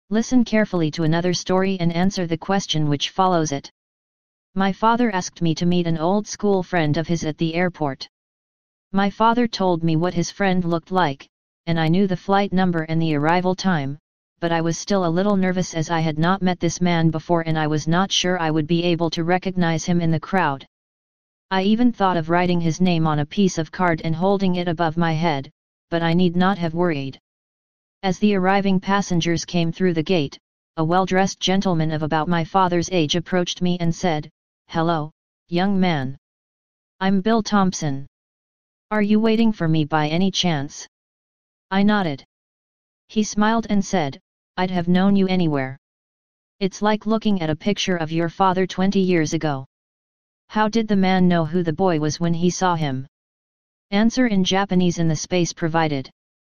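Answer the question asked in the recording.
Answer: The boy looked just like his father did 20 years ago.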